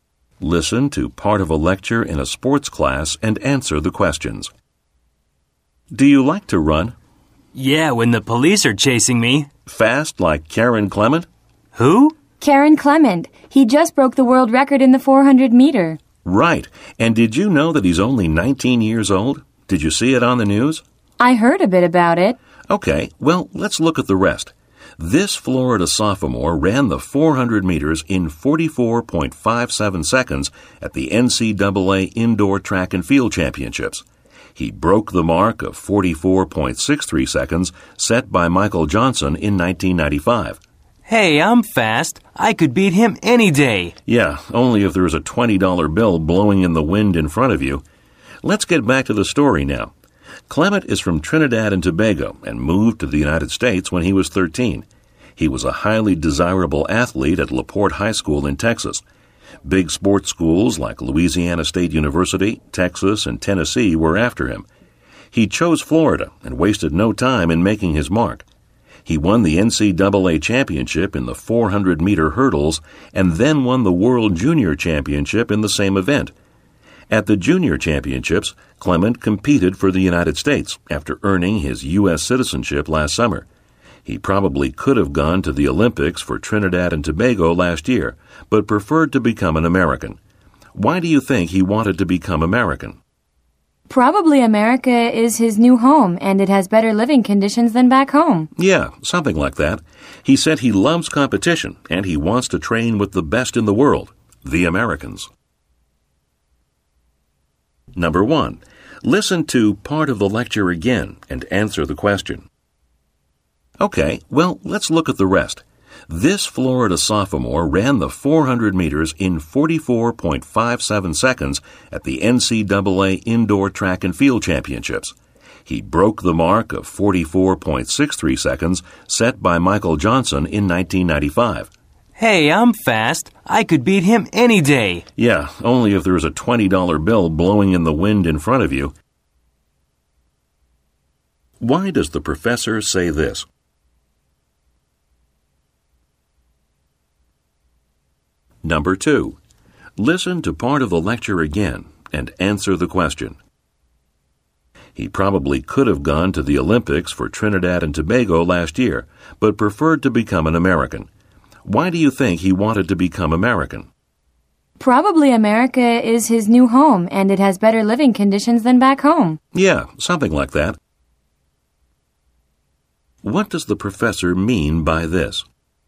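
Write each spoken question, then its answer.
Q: Why does the professor say this?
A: To joke that the student would only run fast if there were money to chase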